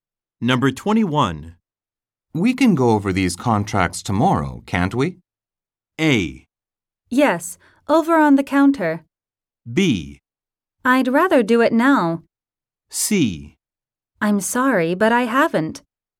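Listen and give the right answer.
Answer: B: I'd rather do it now.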